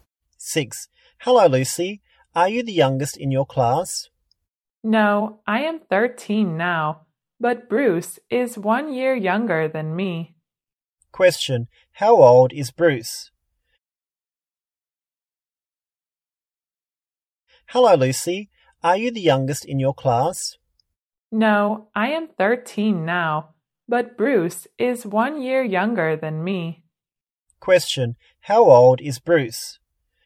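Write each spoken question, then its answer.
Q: How old is Bruce?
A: 12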